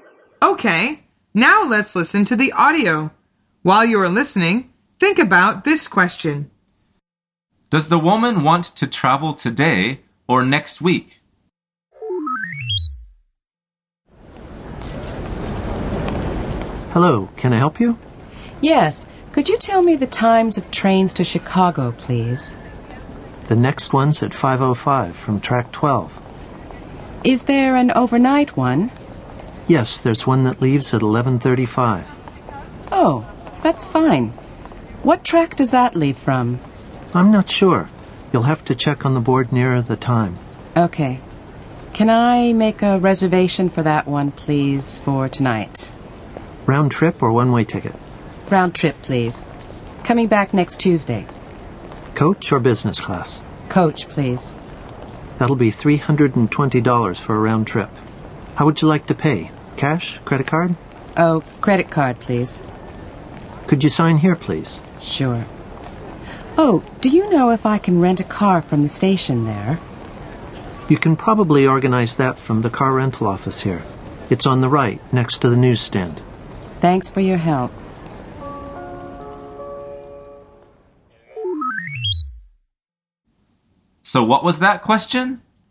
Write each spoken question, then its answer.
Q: Does the woman want to travel today or next week?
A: The answer is today.